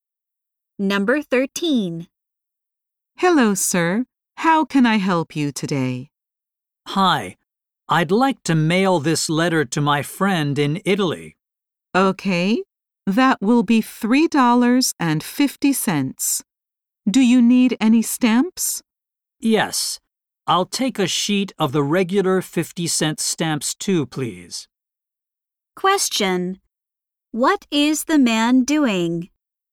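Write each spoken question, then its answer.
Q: What is the man doing?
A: Mailing a letter to his friend in Italy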